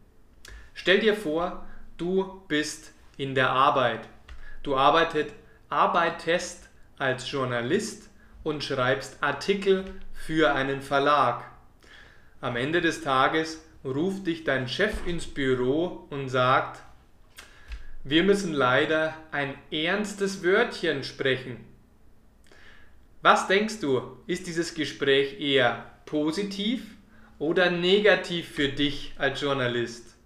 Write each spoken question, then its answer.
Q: Was denkst du, ist dieses Gespräch eher positiv oder negativ für dich als Journalist?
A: dann ist es meistens kein gutes Zeichen.